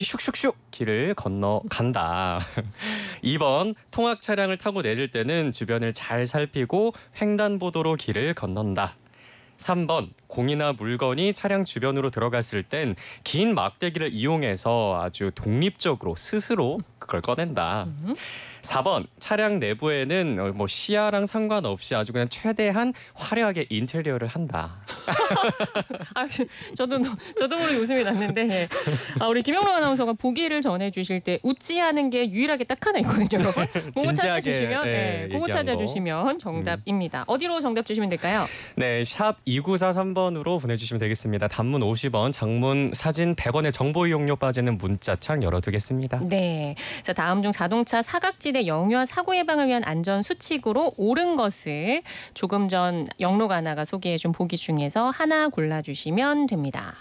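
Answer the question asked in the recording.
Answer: 2번: 통학 차량을 타고 내릴 때는 주변을 잘 살피고 횡단보도로 길을 건넌다.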